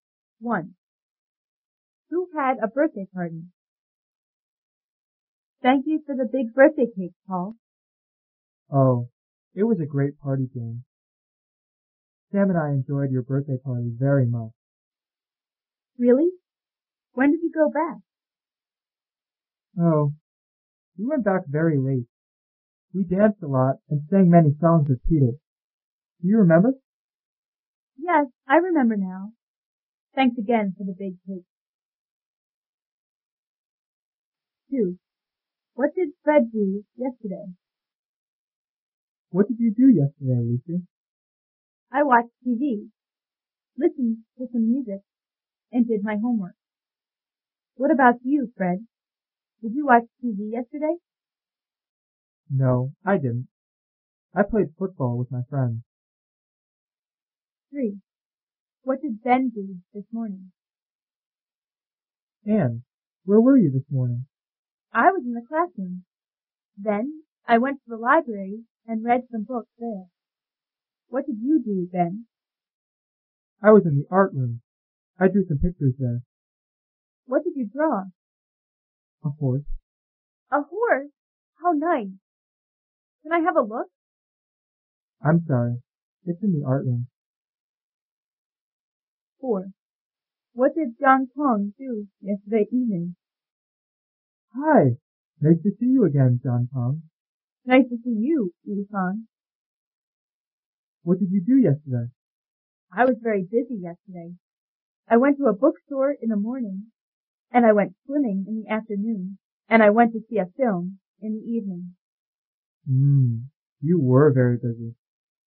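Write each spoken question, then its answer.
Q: What did Fred do yesterday?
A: He played football with his friends.

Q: What did Ben do this morning?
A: He drew some pictures (a horse) in the art room.

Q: What did John Kong do yesterday evening?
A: He went to see a film.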